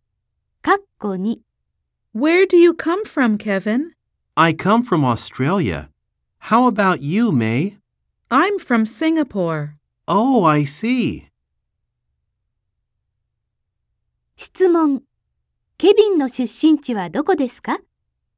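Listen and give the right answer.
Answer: オーストラリア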